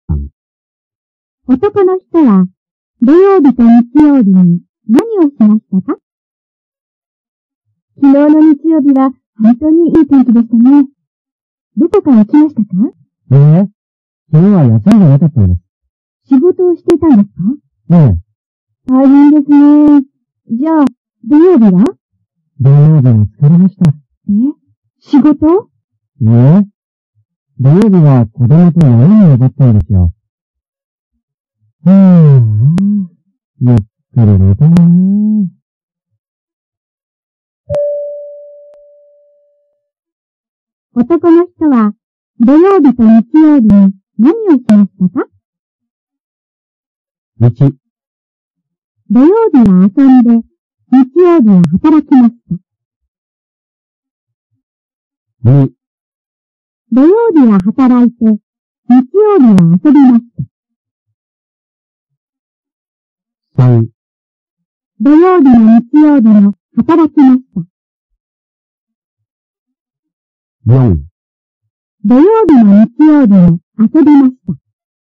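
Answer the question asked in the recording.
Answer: 1: 土曜日は遊んで、日曜日は働きました。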